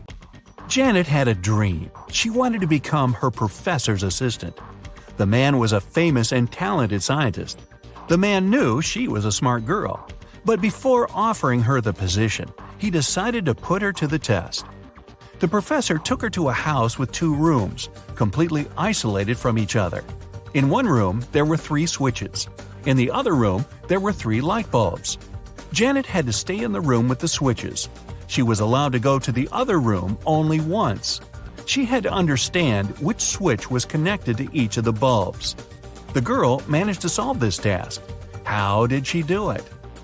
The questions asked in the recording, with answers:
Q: How did she do it?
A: She turned on the first switch and waited for a minute.